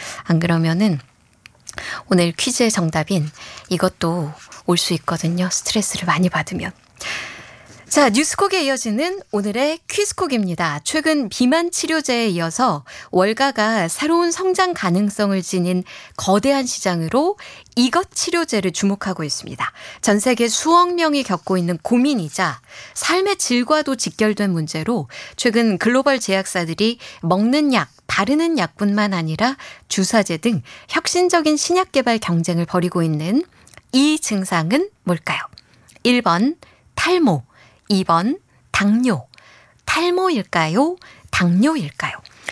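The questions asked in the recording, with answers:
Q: 전 세계 수억 명이 겪고 있는 고민이자 삶의 질과도 직결된 문제로 최근 글로벌 제약사들이 먹는 약, 바르는 약뿐만 아니라 주사제 등 혁신적인 신약 개발 경쟁을 벌이고 있는 이 증상은 뭘까요?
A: 1: 탈모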